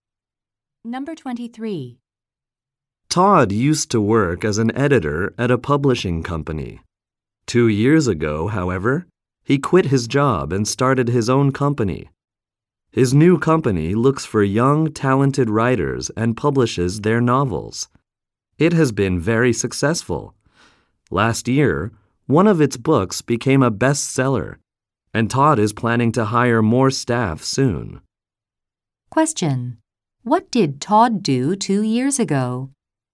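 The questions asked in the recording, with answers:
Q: What did Todd do 2 years ago?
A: He quit his job and started his own company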